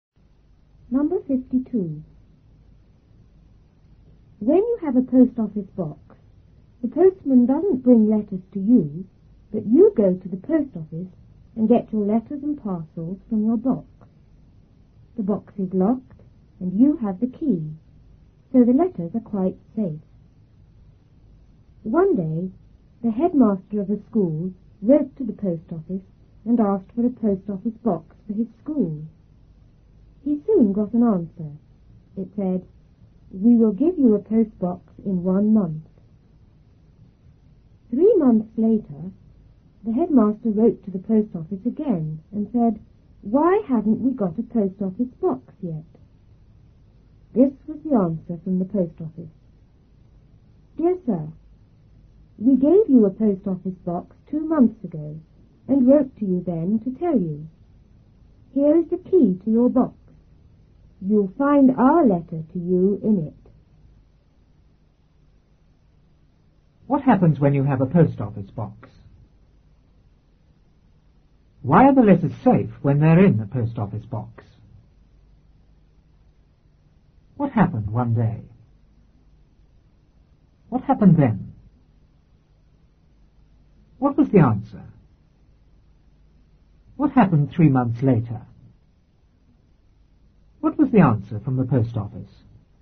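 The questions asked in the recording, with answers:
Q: What happens when you have a post office box?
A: The postman doesn't bring letters; you go to the post office and get your letters and parcels from your box.

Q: Why are the letters safe when they're in the post office box?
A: Because the box is locked and you have the key.

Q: What happened one day?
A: The headmaster of a school wrote to the post office and asked for a post office box for his school.

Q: What was the answer?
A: "We will give you a post box in 1 month."

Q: What happened 3 months later?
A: The headmaster wrote again asking why they hadn't got a post office box yet.

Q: What was the answer from the post office?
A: They had given him a box 2 months ago and written to tell him; the letter was in the box, and here was the key.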